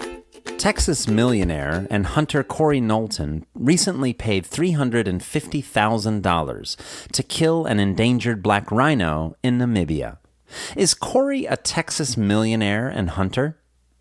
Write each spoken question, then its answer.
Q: Is Corey a Texas millionaire and hunter?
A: Yes, Corey is a Texas millionaire and hunter.